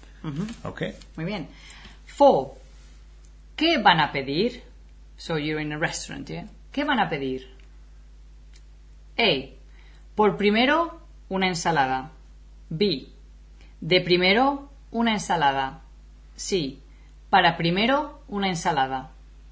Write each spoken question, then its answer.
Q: ¿Qué van a pedir?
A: Okay, so I would say de primero,